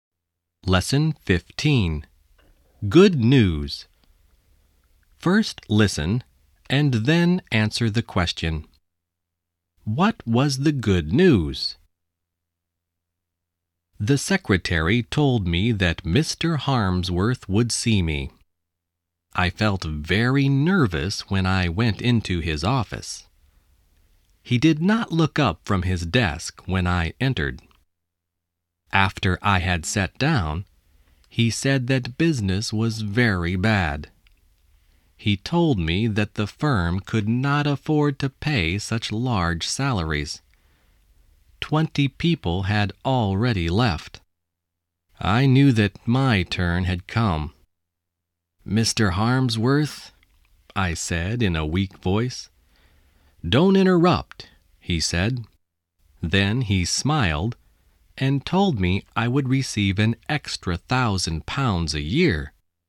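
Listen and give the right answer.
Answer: He would receive an extra £1,000 a year.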